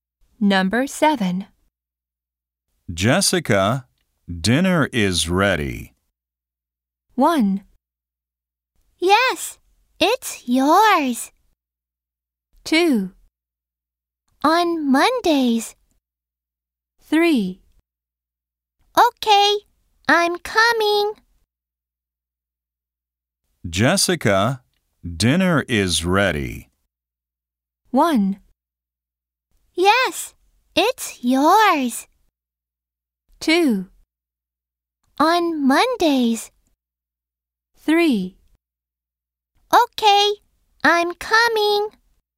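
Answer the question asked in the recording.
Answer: 3: Okay, I'm coming.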